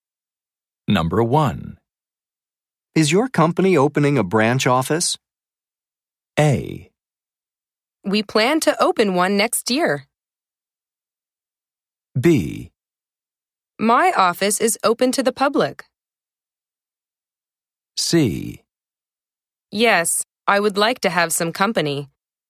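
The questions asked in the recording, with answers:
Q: Is your company opening a branch office?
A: A: We plan to open one next year.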